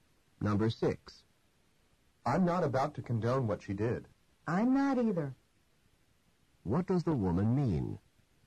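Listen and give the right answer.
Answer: She doesn't approve of what she did either.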